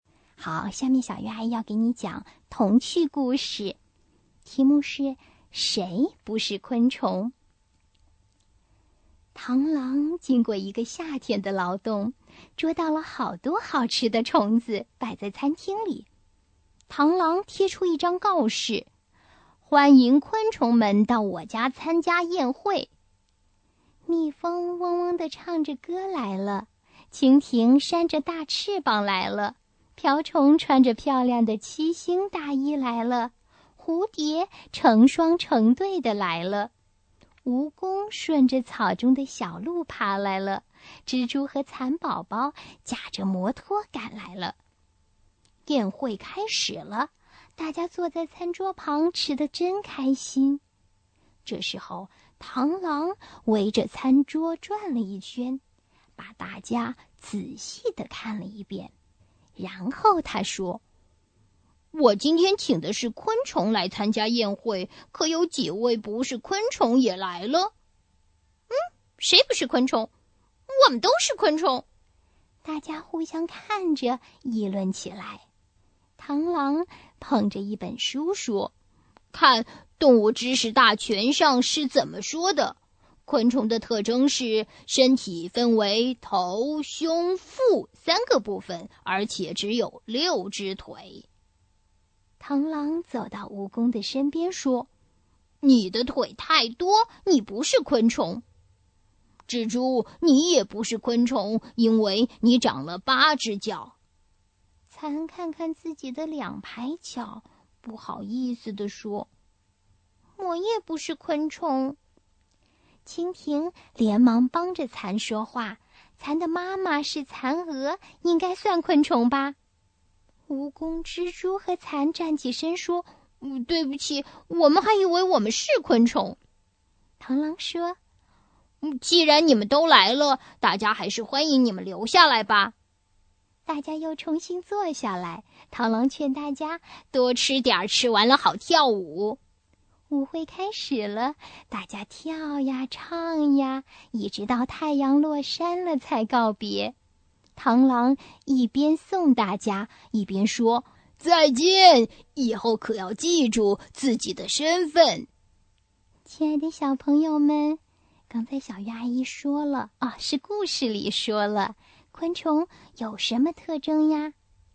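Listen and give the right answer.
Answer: 身体分为头、胸、腹三个部分,而且只有六只腿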